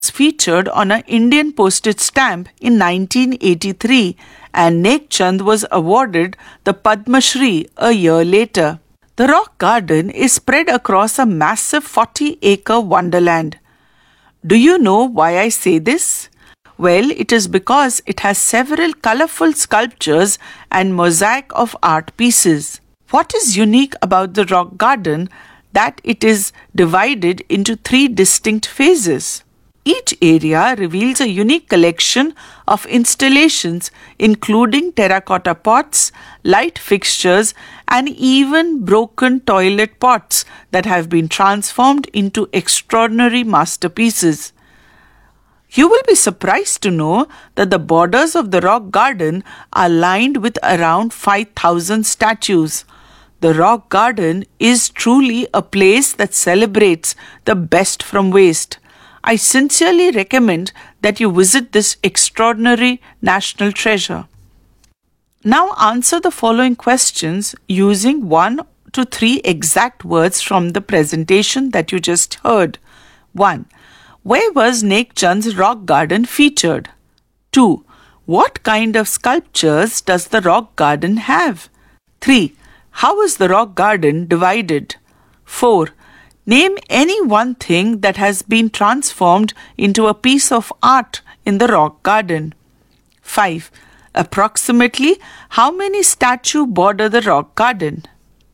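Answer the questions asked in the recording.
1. on an Indian postage stamp
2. colorful sculptures
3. three distinct phases
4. terracotta pots / light fixtures / broken toilet pots
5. around 5,000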